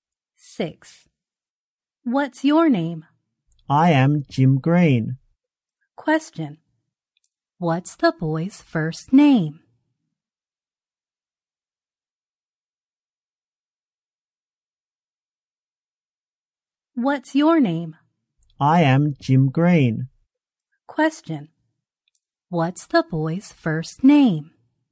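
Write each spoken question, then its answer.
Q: What's the boy's first name?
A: Jim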